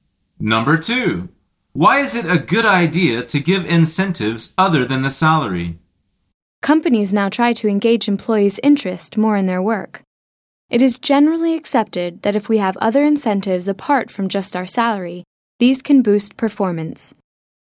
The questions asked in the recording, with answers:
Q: why is it a good idea to give incentives other than the salary?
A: The answer is because these can boost performance.